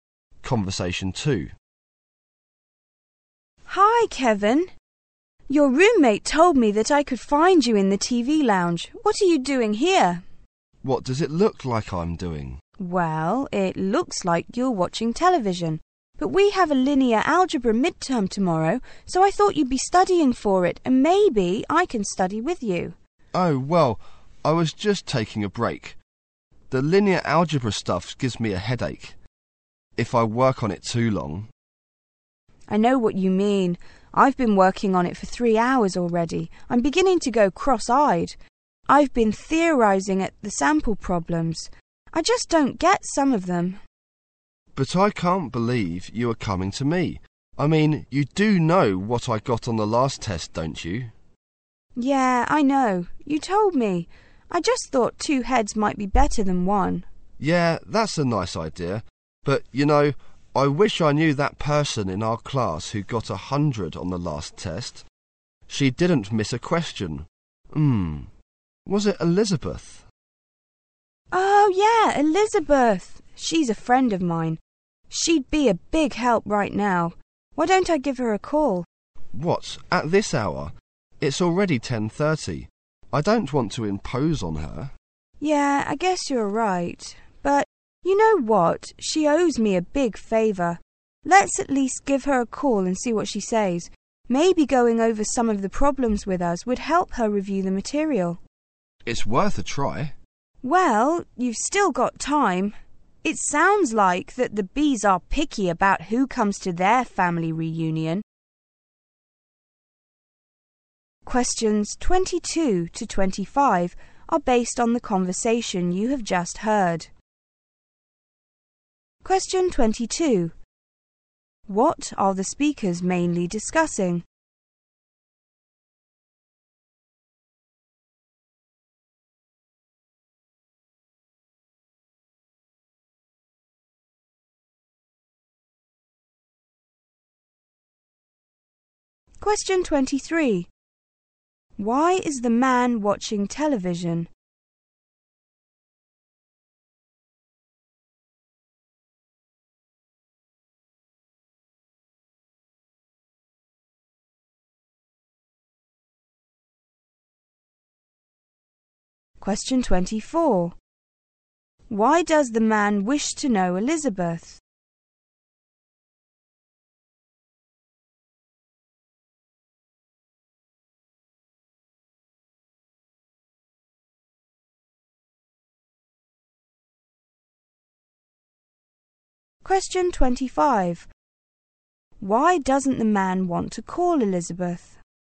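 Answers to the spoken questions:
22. Studying for the linear algebra midterm
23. He is taking a break from studying
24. She got 100 on the last test and could help them
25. It is too late at night and he doesn't want to impose on her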